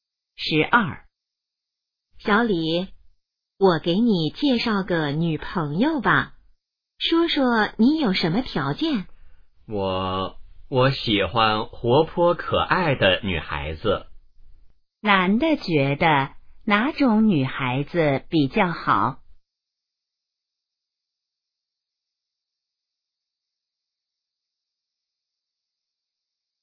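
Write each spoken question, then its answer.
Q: 男的觉得哪种女孩子比较好?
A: 活泼可爱的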